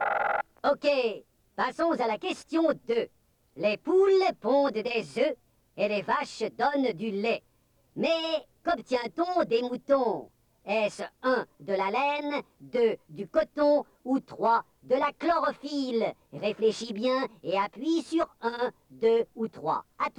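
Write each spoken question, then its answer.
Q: Mais qu'obtient-on des moutons?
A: 1: de la laine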